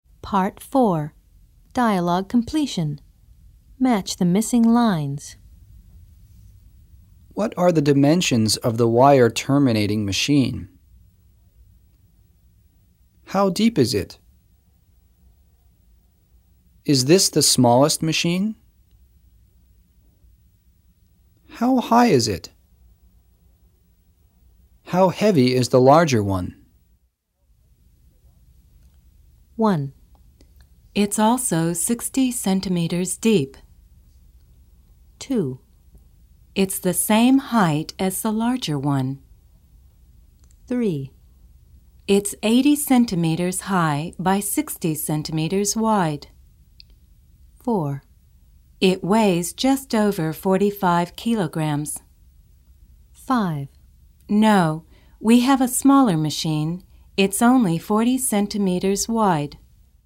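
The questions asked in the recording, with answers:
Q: What are the dimensions of the wire terminating machine?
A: 3: It's 80 centimeters high by 60 centimeters wide.

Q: How deep is it?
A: 1: It's also 60 centimeters deep.

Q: Is this the smallest machine?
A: 5: No, we have a smaller machine. It's only 40 centimeters wide.

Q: How high is it?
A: 2: It's the same height as the larger one.

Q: How heavy is the larger one?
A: 4: It weighs just over 45 kilograms.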